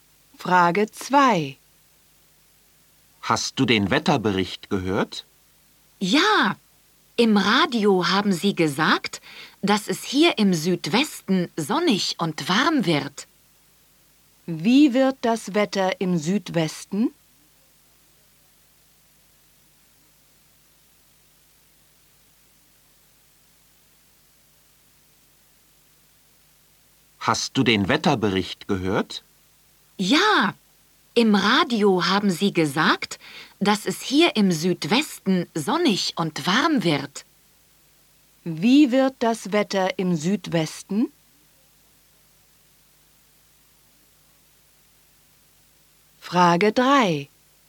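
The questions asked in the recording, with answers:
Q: Wie wird das Wetter im Südwesten?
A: Sonnig und warm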